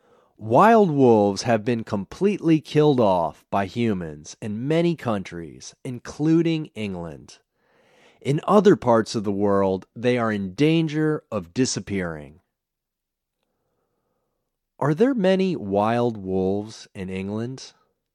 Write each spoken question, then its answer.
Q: Are there many wild wolves in England?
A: No, they've been killed off.